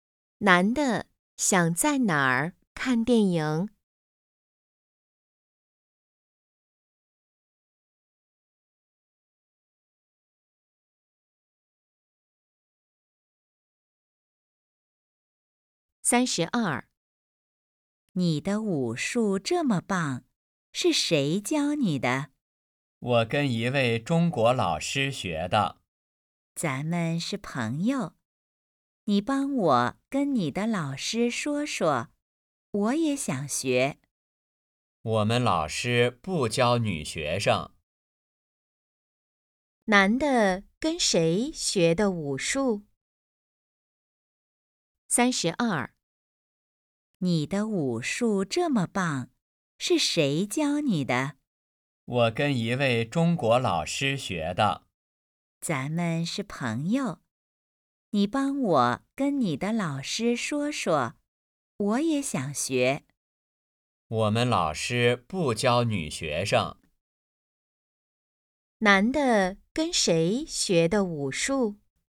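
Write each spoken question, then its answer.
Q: 男的跟谁学的武术?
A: 一位中国老师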